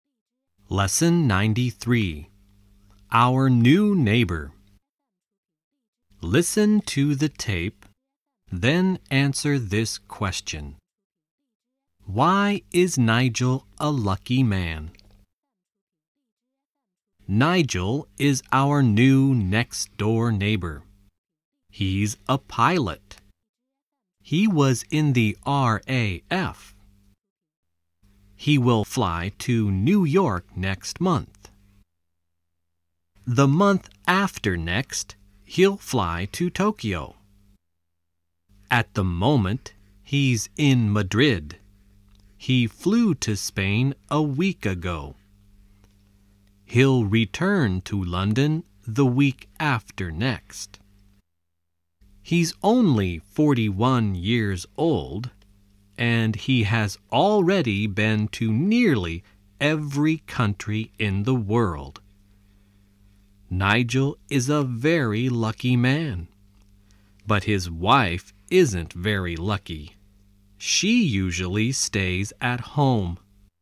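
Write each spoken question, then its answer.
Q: Why is Nigel a lucky man?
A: Because he's a pilot and has already been to nearly every country in the world.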